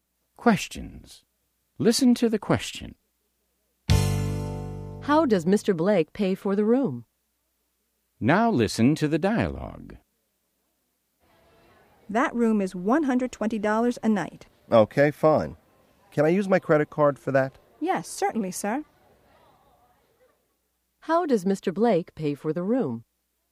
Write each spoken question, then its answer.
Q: How does Mr. Blake pay for the room?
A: He uses his credit card.